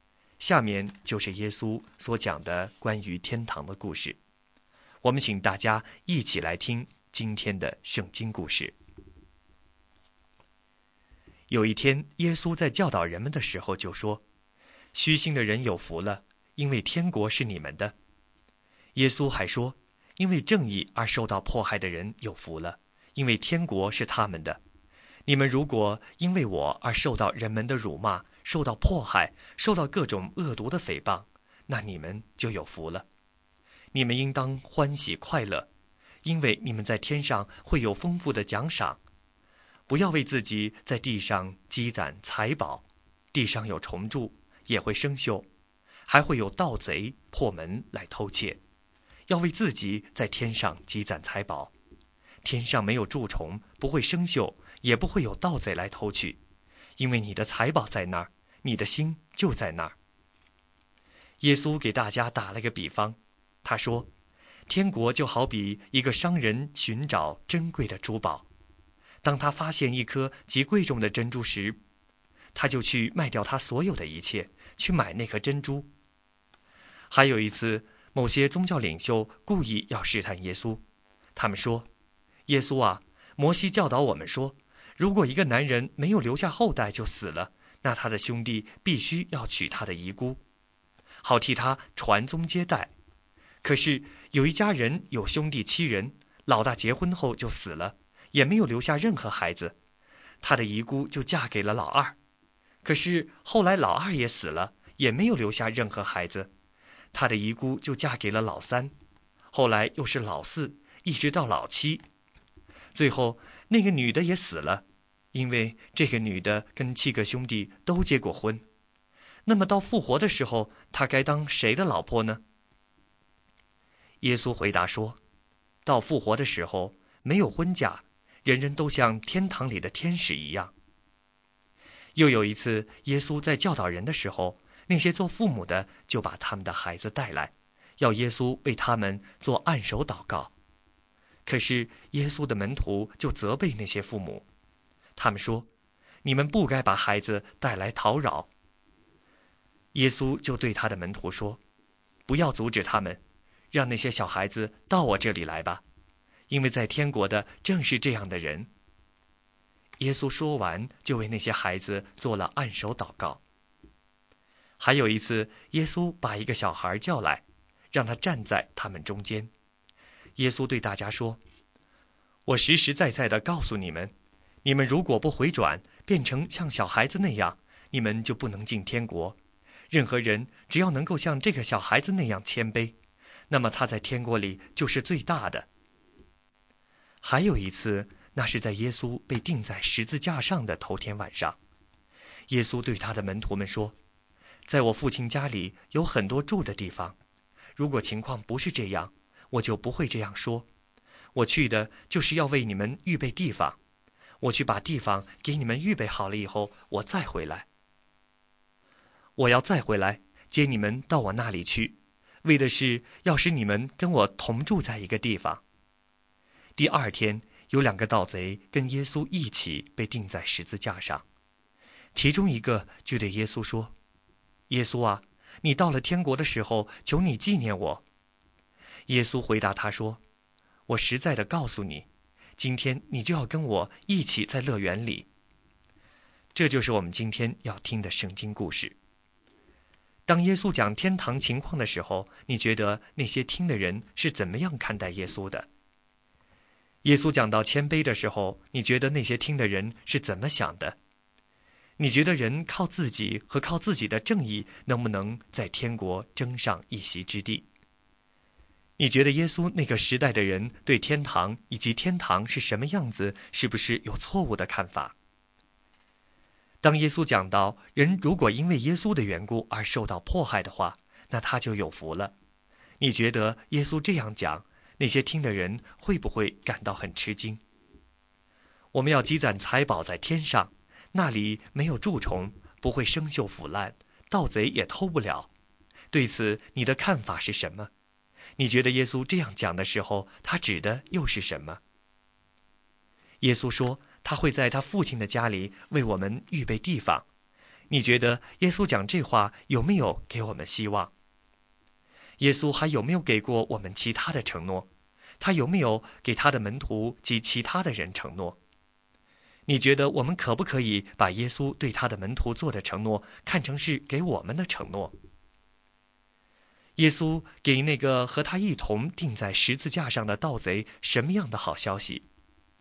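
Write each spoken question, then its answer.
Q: 耶稣给那个和他一同钉在十字架上的盗贼什么样的好消息?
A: 今天他就要跟耶稣一起在乐园里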